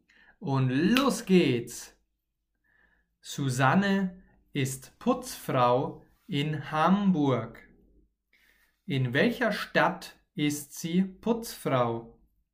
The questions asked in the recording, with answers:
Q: In welcher Stadt ist sie Putzfrau?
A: in Hamburg. Sie ist Putzfrau in Hamburg.